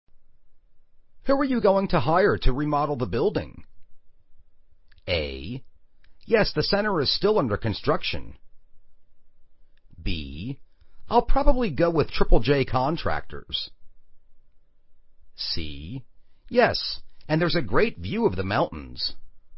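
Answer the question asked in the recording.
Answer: B: I'll probably go with Triple J Contractors.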